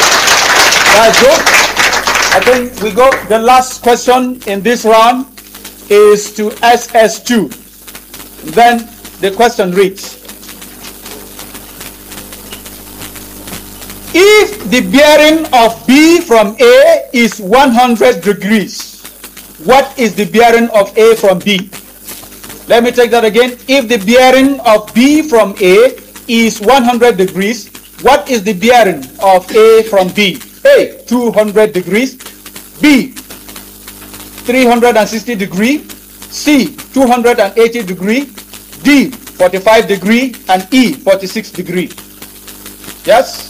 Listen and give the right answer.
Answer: C, 280